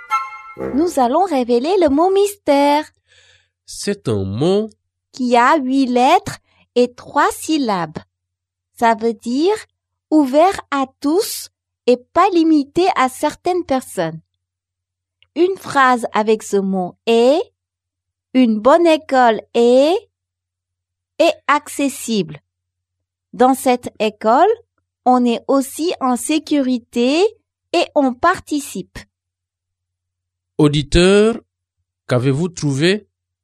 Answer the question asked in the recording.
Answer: Le mot mystère est inclusif.